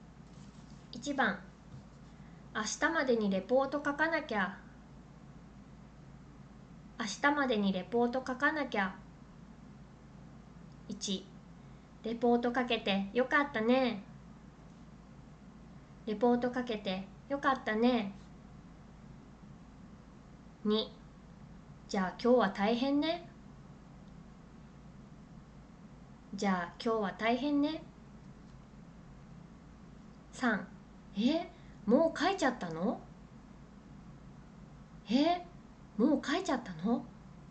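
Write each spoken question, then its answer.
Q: 明日までにレポート書かなきゃ。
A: 2: じゃあ今日は大変ね。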